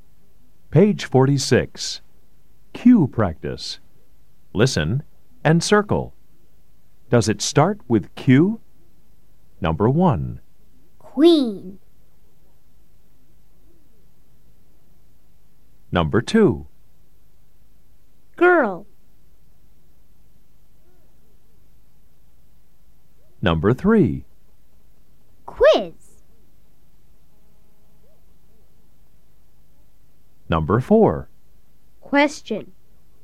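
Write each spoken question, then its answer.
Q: Queen.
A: Yes

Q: Girl.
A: No

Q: Quiz.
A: Yes

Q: Question.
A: Yes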